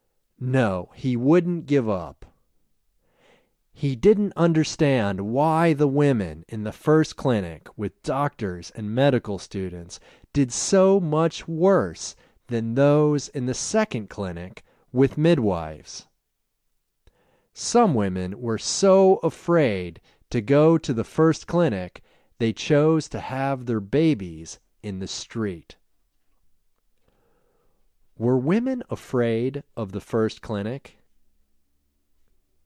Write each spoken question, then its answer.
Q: Were women afraid of the first clinic?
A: Yes, they were afraid of the first clinic.